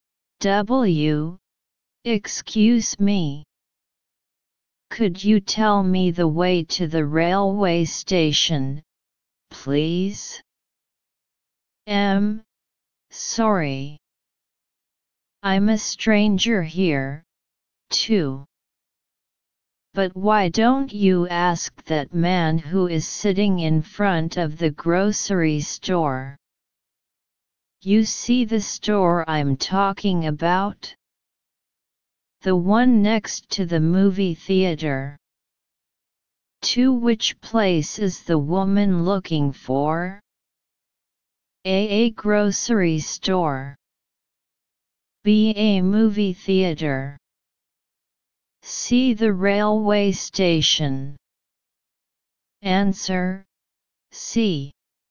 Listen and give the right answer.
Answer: Answer, C.